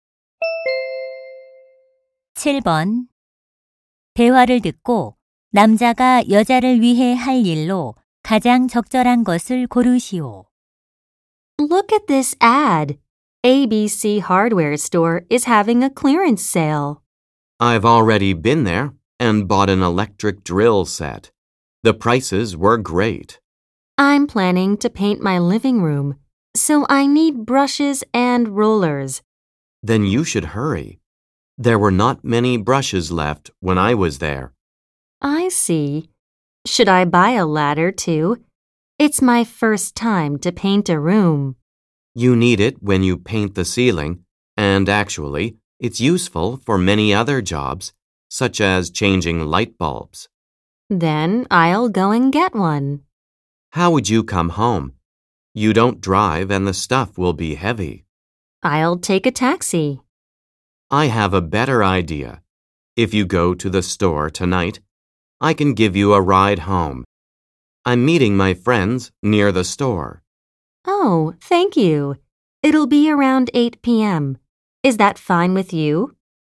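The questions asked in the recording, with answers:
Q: 대화를 듣고 남자가 여자를 위해 할 일로 가장 적절한 것을 고르시오.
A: 여자를 집까지 차로 태워다 주기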